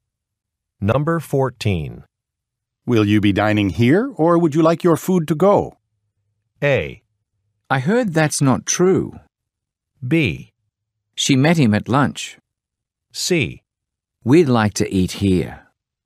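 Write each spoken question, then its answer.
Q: Will you be dining here, or would you like your food to go?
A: C: We'd like to eat here.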